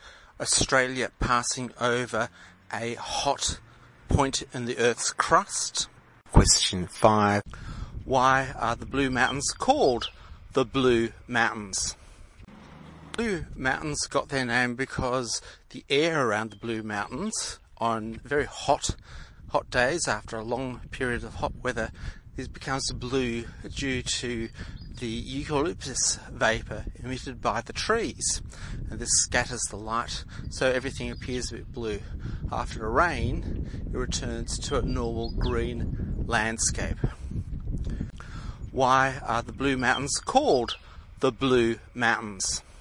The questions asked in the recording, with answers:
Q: Why are the Blue Mountains called the Blue Mountains?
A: D. Because the eucalyptus trees emit a gas which scatters blue light.